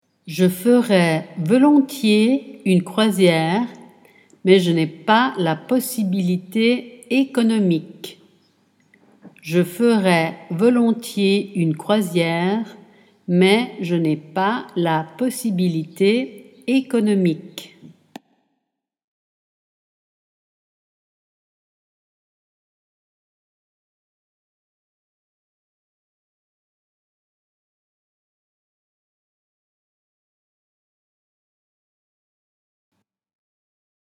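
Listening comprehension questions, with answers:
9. Je mais .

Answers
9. ferais volontiers une croisière, / je n'ai pas la possibilité économique

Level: Dettato di francese A2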